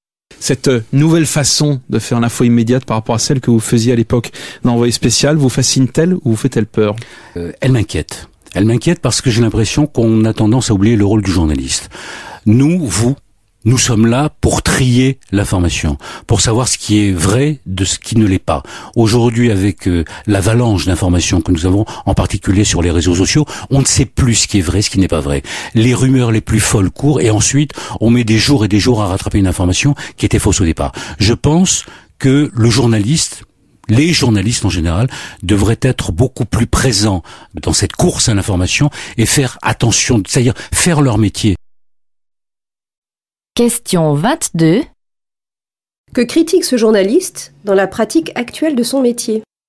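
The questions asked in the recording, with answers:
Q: Que critique ce journaliste dans la pratique actuelle de son métier ?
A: On oublie le rôle du journaliste : trier l'information et vérifier ce qui est vrai, ce qui laisse circuler des rumeurs et de fausses informations.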